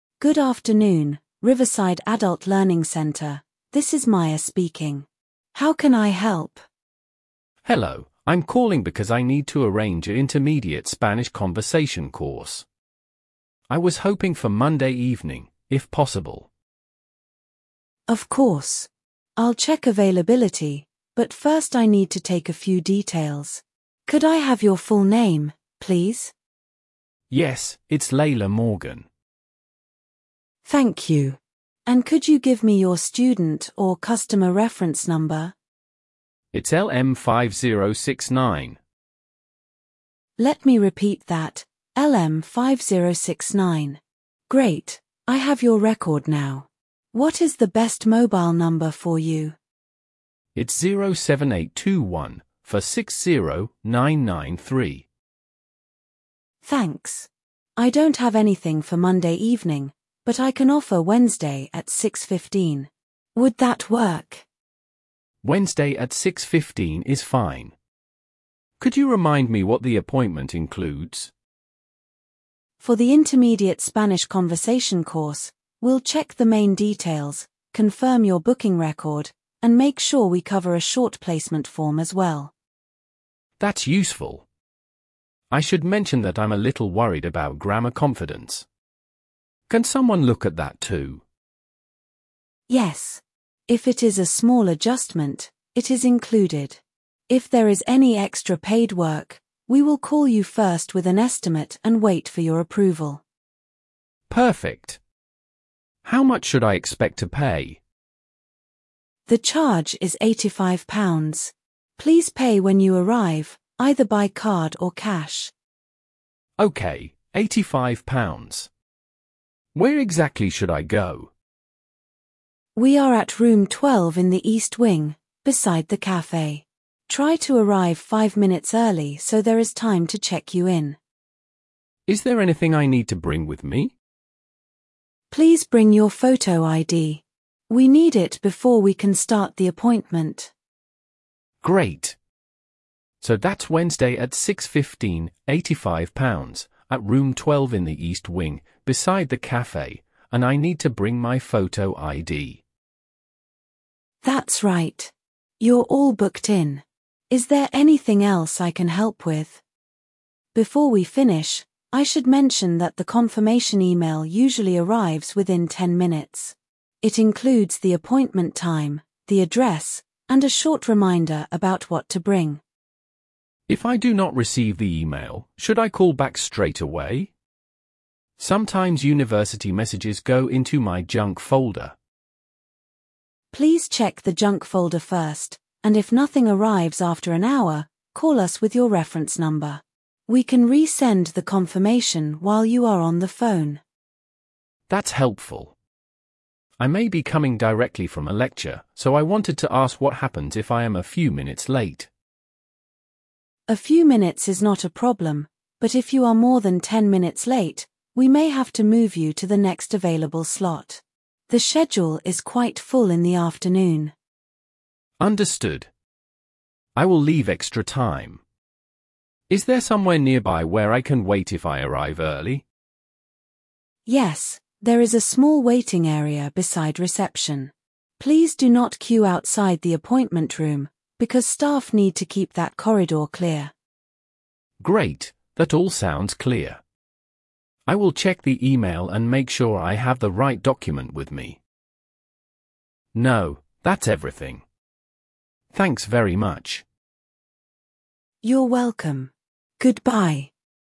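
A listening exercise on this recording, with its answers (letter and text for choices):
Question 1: What service does the caller want to arrange?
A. A refund request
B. Intermediate spanish conversation course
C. A lecture ticket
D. A library renewal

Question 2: Which day is the appointment booked for?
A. Monday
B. Wednesday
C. Saturday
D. Sunday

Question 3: What time is the appointment?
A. Nine fifteen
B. six fifteen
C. Two o'clock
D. Six forty-five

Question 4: How much will the caller pay?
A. Free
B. Ten pounds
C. Eighty-five pounds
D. One hundred pounds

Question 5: Where should the caller go?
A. Room twelve in the east wing, beside the cafe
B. The main library entrance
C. Room twenty on the top floor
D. The city bus station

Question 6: What must the caller bring?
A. A printed map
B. Photo id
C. A passport photo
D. A bank statement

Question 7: What will happen if extra paid work is needed?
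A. It will be done automatically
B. The booking will be cancelled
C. The caller will be contacted first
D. The fee will be doubled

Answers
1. B. Intermediate spanish conversation course
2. B. Wednesday
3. B. six fifteen
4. C. Eighty-five pounds
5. A. Room twelve in the east wing, beside the cafe
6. B. Photo id
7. C. The caller will be contacted first

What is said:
Staff: Good afternoon, Riverside Adult Learning Centre, this is Maya speaking. How can I help?
Student: Hello, I'm calling because I need to arrange a intermediate Spanish conversation course. I was hoping for Monday evening, if possible.
Staff: Of course. I'll check availability, but first I need to take a few details. Could I have your full name, please?
Student: Yes, it's Leila Morgan.
Staff: Thank you. And could you give me your student or customer reference number?
Great, I have your record now. What is the best mobile number for you?
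Staff: Thanks. I don't have anything for Monday evening, but I can offer Wednesday at six fifteen. Would that work?
Student: Wednesday at six fifteen is fine. Could you remind me what the appointment includes?
Staff: For the intermediate Spanish conversation course, we'll check the main details, confirm your booking record, and make sure we cover a short placement form as well.
Student: That's useful. I should mention that I'm a little worried about grammar confidence. Can someone look at that too?
Staff: Yes. If it is a small adjustment, it is included. If there is any extra paid work, we will call you first with an estimate and wait for your approval.
Student: Perfect. How much should I expect to pay?
Please pay when you arrive, either by card or cash.
Student: Okay, eighty-five pounds. Where exactly should I go?
Staff: We are at room twelve in the east wing, beside the cafe. Try to arrive five minutes early so there is time to check you in.
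Student: Is there anything I need to bring with me?
Staff: Please bring your photo ID. We need it before we can start the appointment.
Student: Great. So that's Wednesday at six fifteen, eighty-five pounds, at room twelve in the east wing, beside the cafe, and I need to bring my photo ID.
Staff: That's right. You're all booked in. Is there anything else I can help with?
Staff: Before we finish, I should mention that the confirmation email usually arrives within ten minutes. It includes the appointment time, the address, and a short reminder about what to bring.
Student: If I do not receive the email, should I call back straight away? Sometimes university messages go into my junk folder.
Staff: Please check the junk folder first, and if nothing arrives after an hour, call us with your reference number. We can resend the confirmation while you are on the phone.
Student: That's helpful. I may be coming directly from a lecture, so I wanted to ask what happens if I am a few minutes late.
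Staff: A few minutes is not a problem, but if you are more than ten minutes late, we may have to move you to the next available slot. The schedule is quite full in the afternoon.
Student: Understood. I will leave extra time. Is there somewhere nearby where I can wait if I arrive early?
Staff: Yes, there is a small waiting area beside reception. Please do not queue outside the appointment room, because staff need to keep that corridor clear.
Student: Great, that all sounds clear. I will check the email and make sure I have the right document with me.
Student: No, that's everything. Thanks very much.
Staff: You're welcome. Goodbye.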